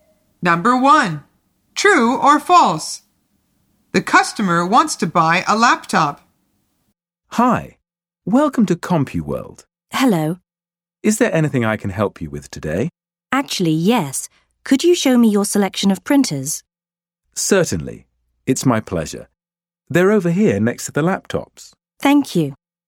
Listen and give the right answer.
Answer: The answer is false. The customer says, could you show me your selection of printers?